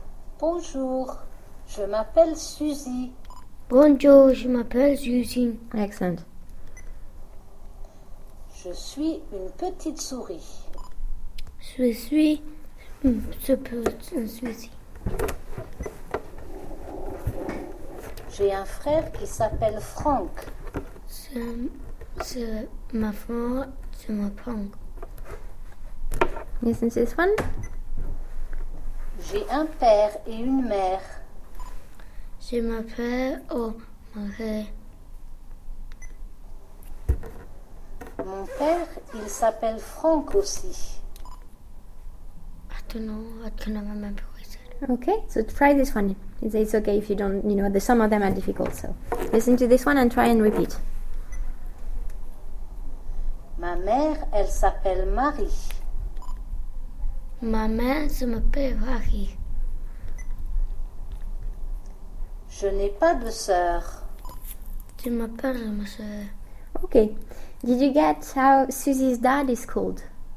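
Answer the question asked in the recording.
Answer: Franck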